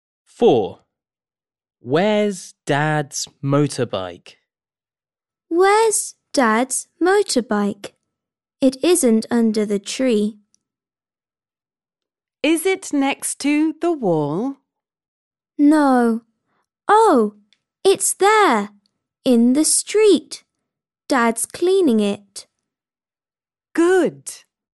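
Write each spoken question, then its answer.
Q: Where's Dad's motorbike?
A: in the street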